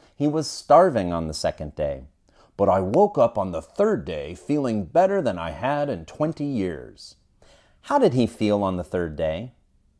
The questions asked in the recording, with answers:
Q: How did he feel on the third day?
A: On the third day, he felt better than he had in 20 years.